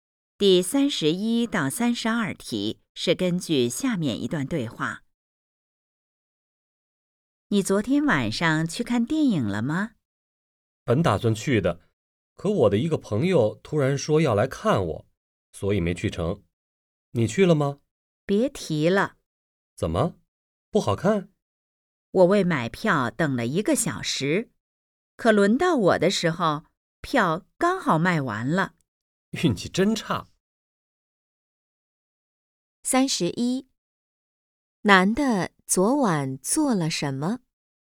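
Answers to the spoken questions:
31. 排队等了1个小时买电影票,但票卖完了
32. 一个朋友突然来看她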